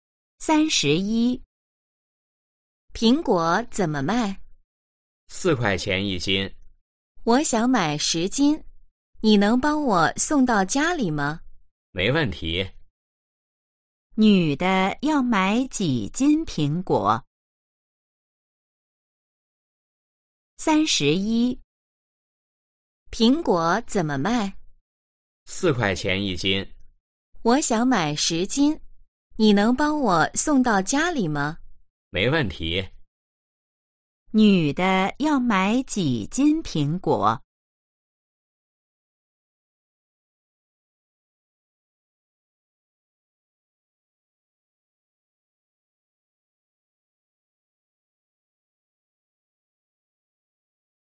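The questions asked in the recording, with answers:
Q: 女的要买几斤苹果?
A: 10斤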